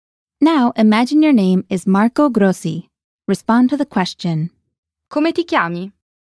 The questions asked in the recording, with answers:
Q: Come ti chiami?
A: Mi chiamo Marco Grossi.